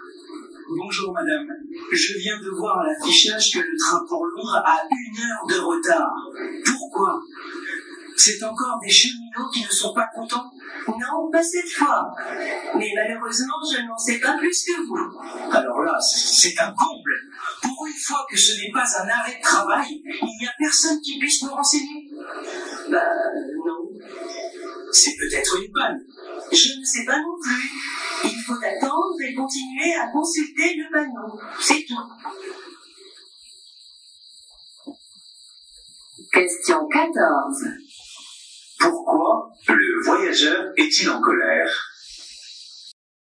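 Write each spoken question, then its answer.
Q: Pourquoi le voyageur est-il en colère ?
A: Parce que le train pour Londres a une heure de retard et que personne ne peut le renseigner.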